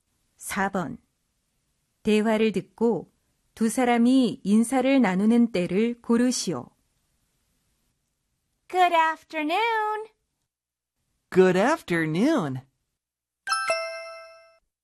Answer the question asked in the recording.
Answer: 네, 오후에 하는 인사이죠.